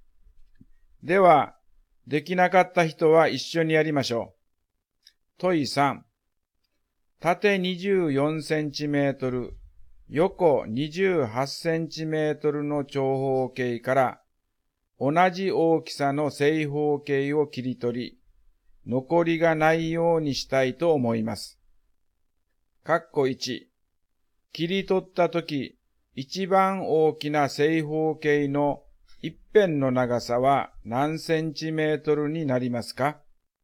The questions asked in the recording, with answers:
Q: 切り取ったとき、一番大きな正方形の一辺の長さは何センチメートルになりますか?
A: 24と28の最大公約数は4です